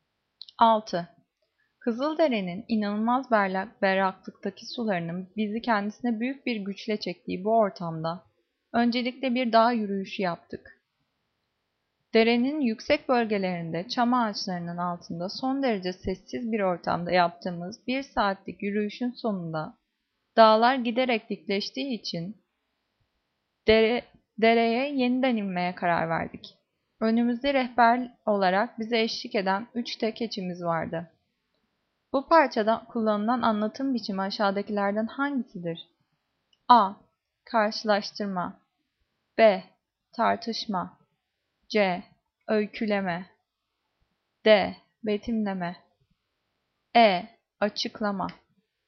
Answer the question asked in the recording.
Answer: Cevap C. Öyküleme.